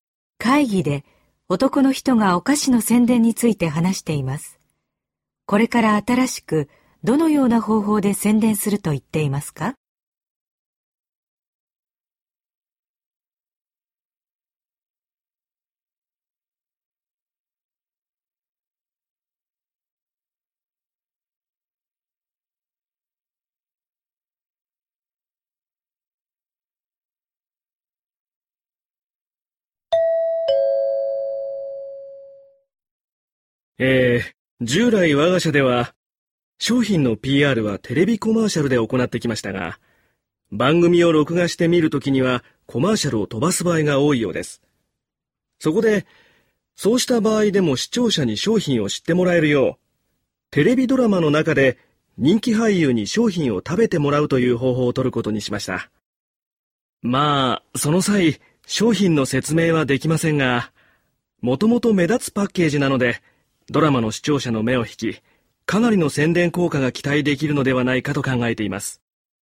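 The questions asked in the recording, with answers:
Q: これから新しくどのような方法で宣伝すると言っていますか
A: テレビドラマの中で人気俳優に商品を食べてもらう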